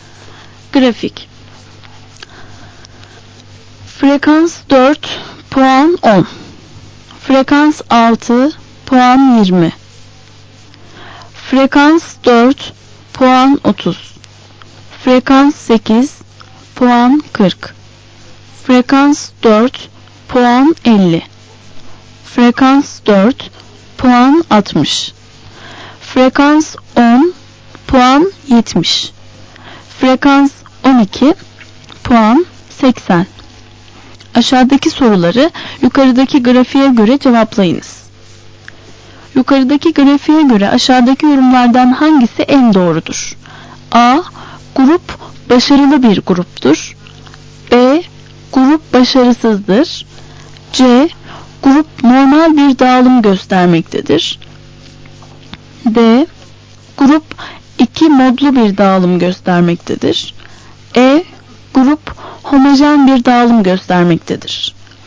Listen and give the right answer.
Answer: Doğru cevap A.